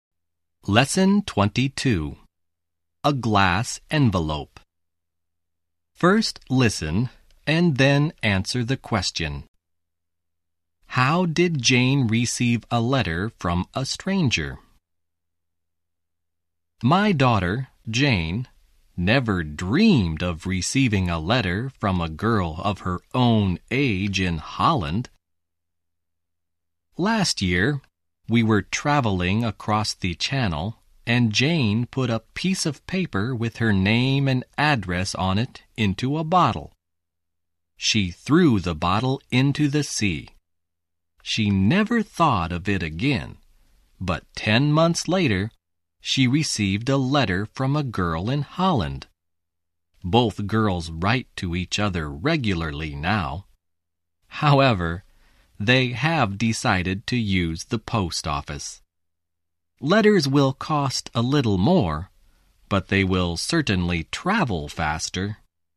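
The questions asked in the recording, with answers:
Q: How did Jane receive a letter from a stranger?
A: She put her name and address in a bottle and threw it into the sea; a girl in Holland found it and wrote to her.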